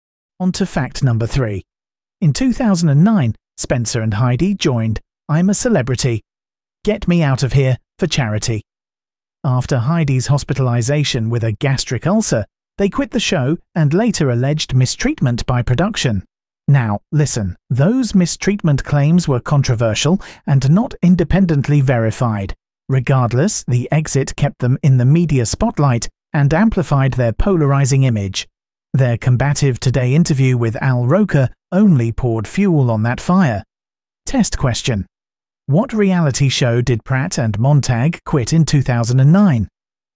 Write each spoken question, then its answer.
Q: What reality show did Pratt and Montag quit in 2009?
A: Correct answer. I'm a Celebrity.